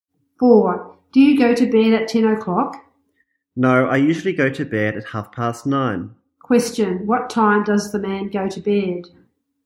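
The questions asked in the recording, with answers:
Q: What time does the man go to bed?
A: At 9:30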